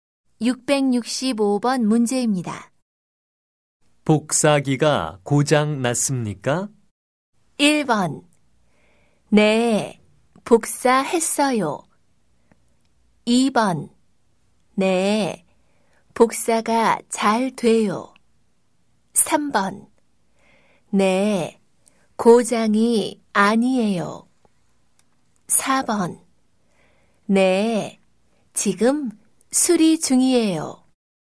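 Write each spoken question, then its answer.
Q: 복사기가 고장 났습니까?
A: 4: 네, 지금 수리 중이에요.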